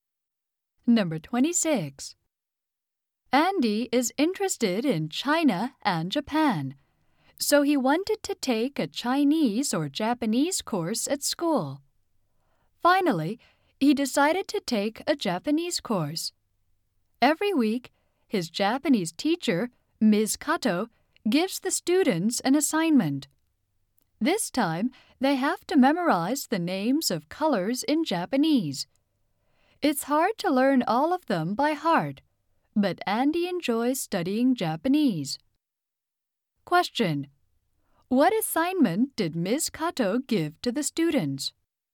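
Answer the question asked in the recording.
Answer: To memorize the names of colors in Japanese.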